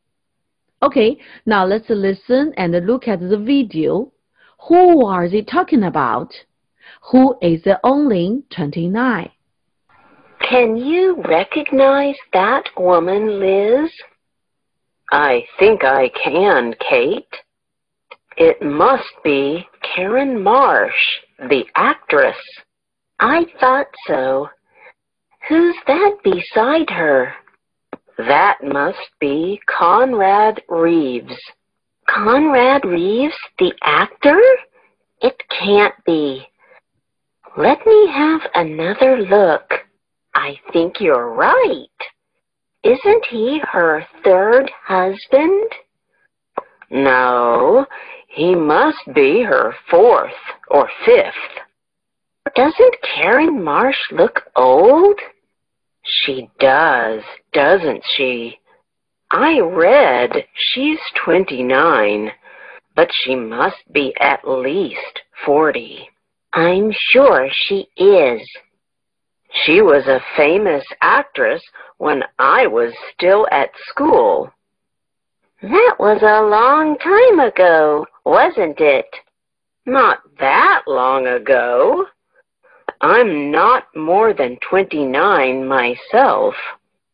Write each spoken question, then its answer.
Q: Who are they talking about?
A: The actress, Carrie Marsh.